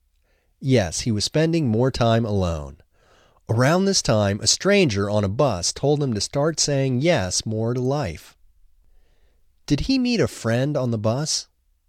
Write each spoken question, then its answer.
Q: Did he meet a friend on the bus?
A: No, he didn't meet a friend on the bus.